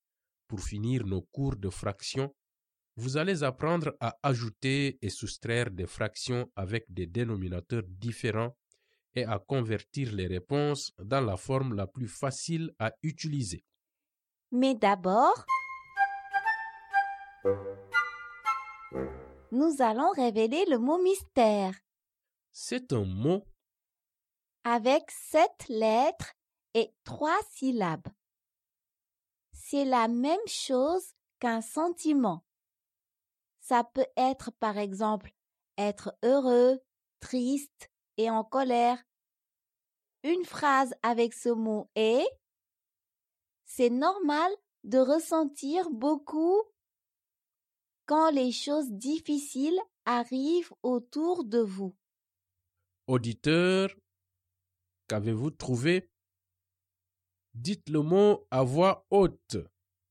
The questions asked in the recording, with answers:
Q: Auditeur, qu'avez-vous trouvé?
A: Le mot mystère est émotion.